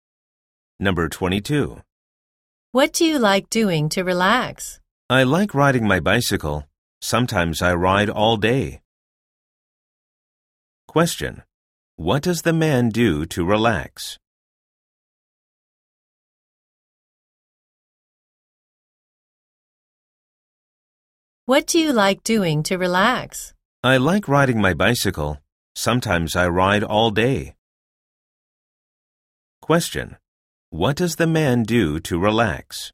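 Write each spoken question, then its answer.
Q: What does the man do to relax?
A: He rides his bicycle.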